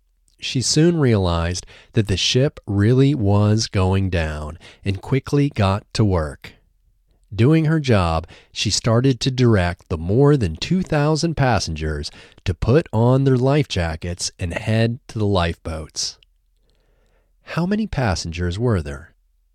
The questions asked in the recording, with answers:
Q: How many passengers were there?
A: There were 2,000 passengers.